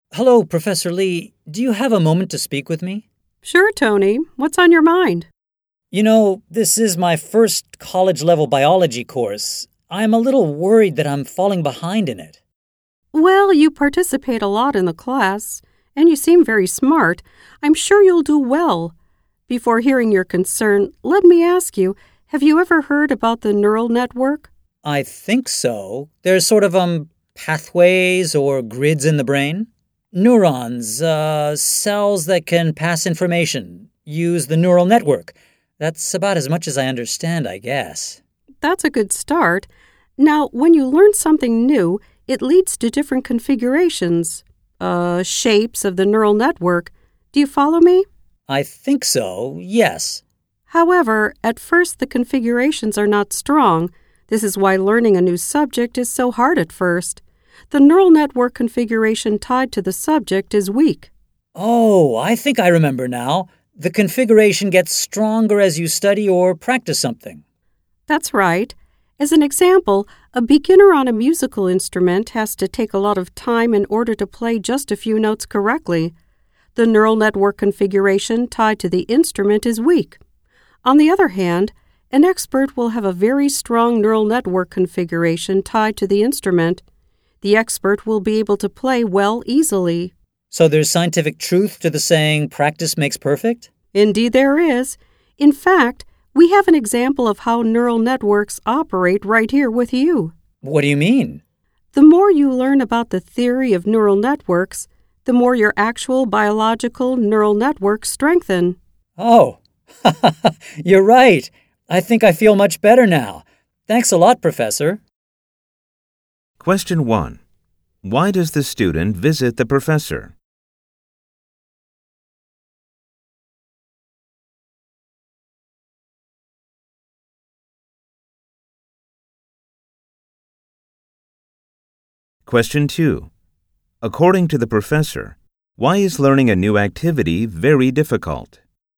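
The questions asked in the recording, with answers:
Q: Why does the student visit the professor?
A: He is worried he is falling behind in his first college-level biology course.

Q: According to the professor, why is learning a new activity very difficult?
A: Because the neural network configuration tied to the new subject is weak at first.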